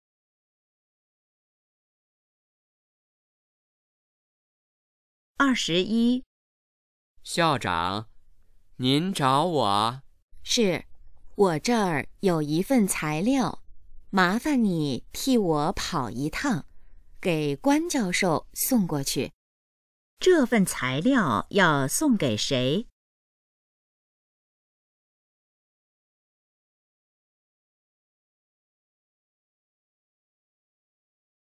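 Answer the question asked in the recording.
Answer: 关教授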